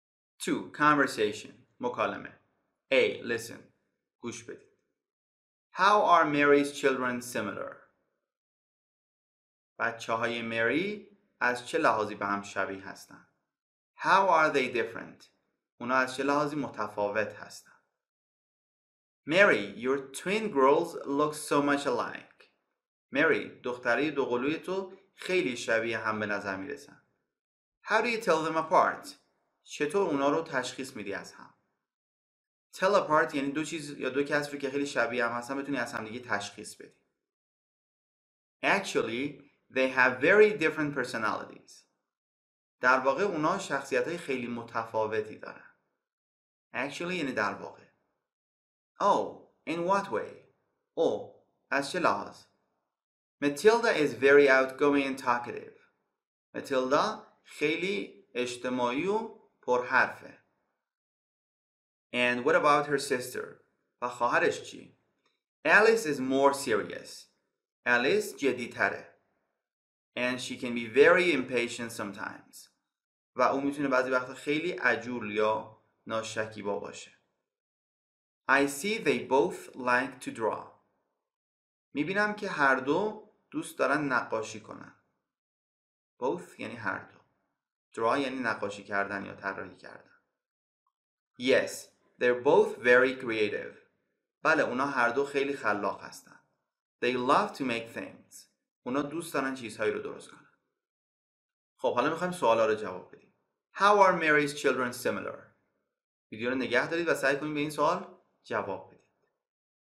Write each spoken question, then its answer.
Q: How are Mary's children similar?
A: Mary's children are both creative.

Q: How are they different?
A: Mary's children are different because Matilda is very outgoing and talkative, but Alice is more serious and sometimes impatient.